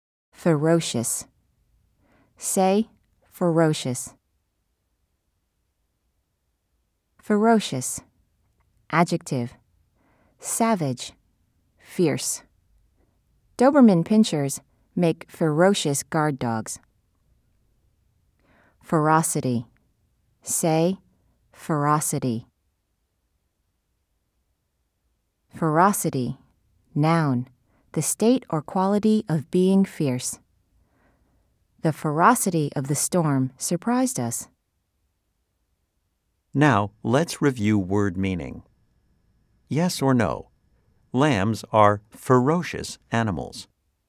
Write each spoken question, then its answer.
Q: Yes or no? Lambs are ferocious animals.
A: If you said no, you are right.